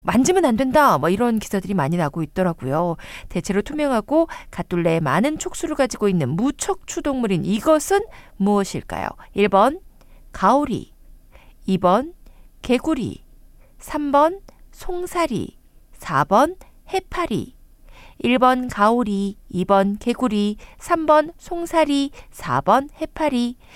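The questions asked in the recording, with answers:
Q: 대체로 투명하고 갓둘레에 많은 촉수를 가지고 있는 무척추 동물인 이것은 무엇일까요?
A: 4: 해파리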